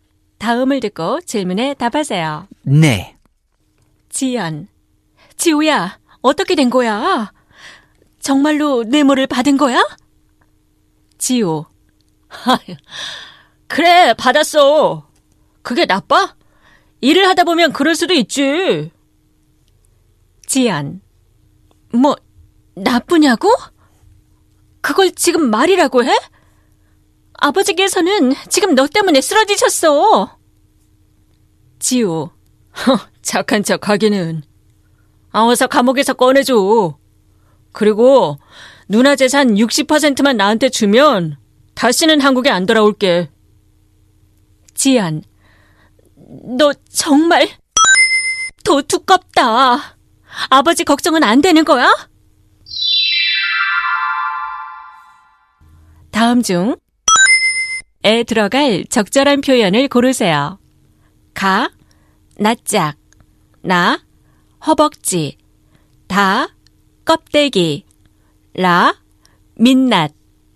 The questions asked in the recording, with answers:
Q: 다음 중, 에 들어갈 적절한 표현을 고르세요.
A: Natjak is the answer